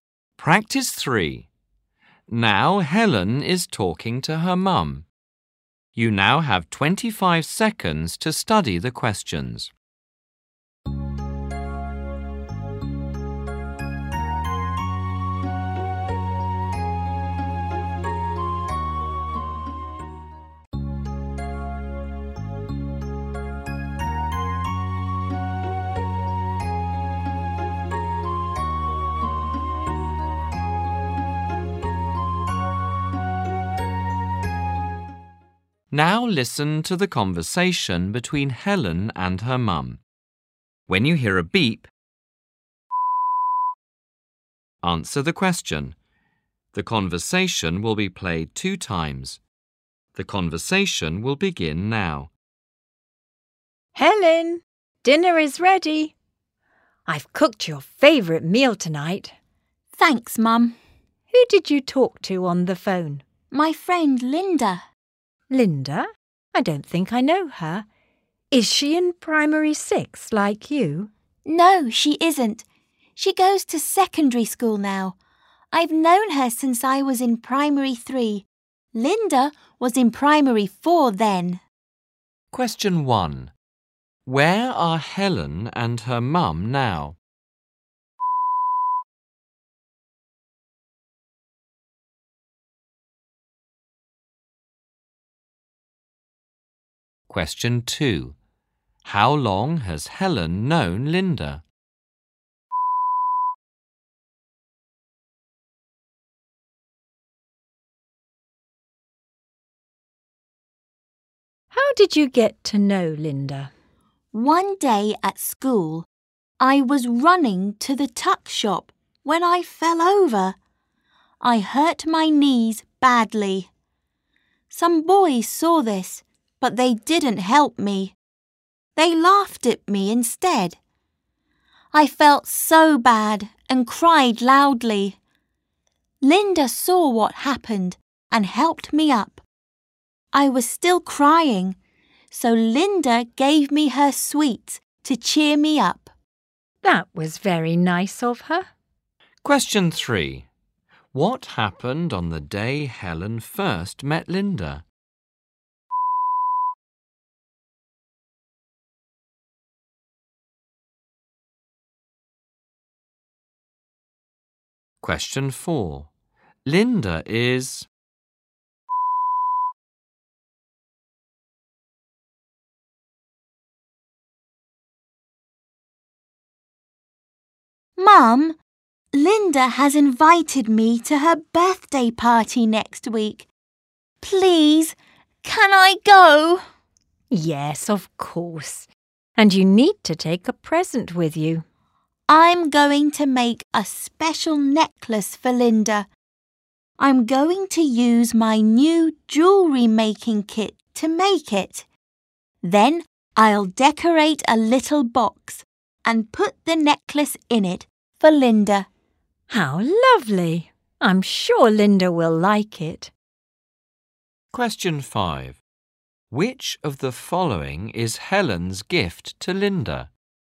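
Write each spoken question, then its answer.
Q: How long has Helen known Linda?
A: Since primary 3 (about three years)

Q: What happened on the day Helen first met Linda?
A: Helen fell over and hurt her knees, and Linda helped her up

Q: Which of the following is Helen's gift to Linda?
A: A necklace she made, in a decorated box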